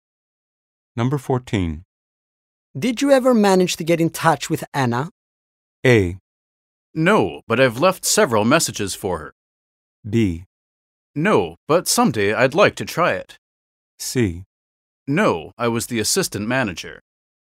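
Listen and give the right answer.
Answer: A: No, but I've left several messages for her.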